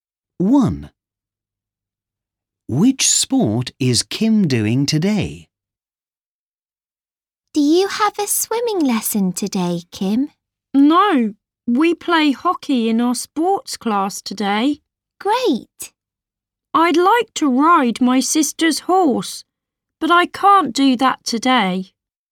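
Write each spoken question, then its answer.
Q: Which sport is Kim doing today?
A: hockey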